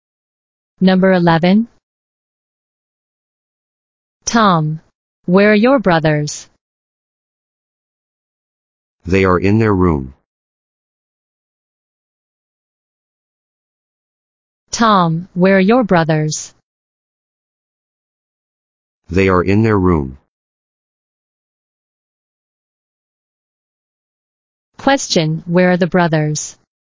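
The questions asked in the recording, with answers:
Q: where are the brothers?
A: In their room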